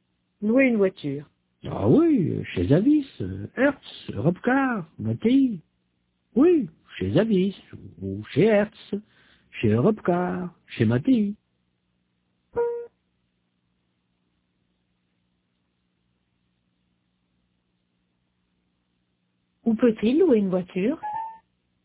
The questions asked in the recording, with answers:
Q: Où peut-il louer une voiture?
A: Chez Avis, Hertz, Robcar, Matéi.